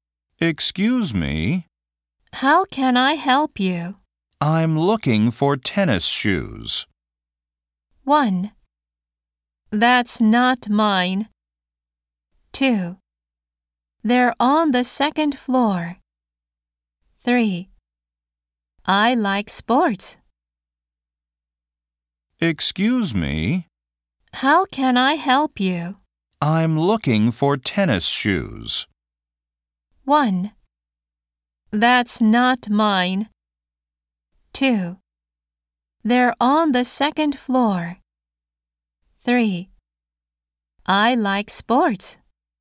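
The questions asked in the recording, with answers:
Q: I'm looking for tennis shoes.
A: 2: They're on the second floor.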